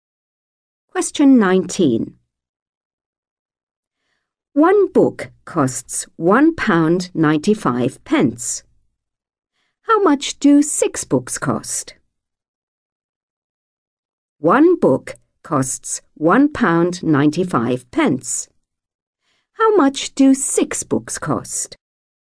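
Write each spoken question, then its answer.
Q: One book costs £1.95. How much do 6 books cost?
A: £11.70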